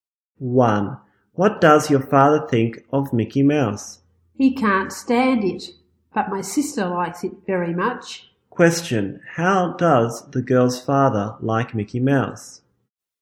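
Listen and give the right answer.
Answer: He can't stand it.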